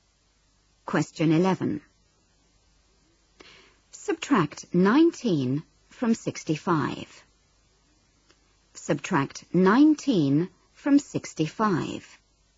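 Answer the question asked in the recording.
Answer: 46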